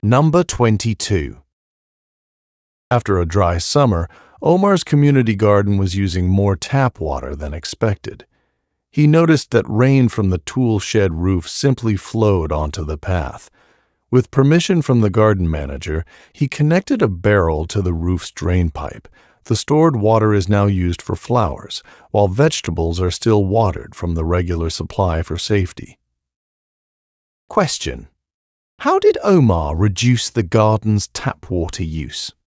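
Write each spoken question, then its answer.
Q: how did Omar reduce the garden's tap water use?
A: He collected rainwater from the tool shed roof in a barrel and used it to water the flowers.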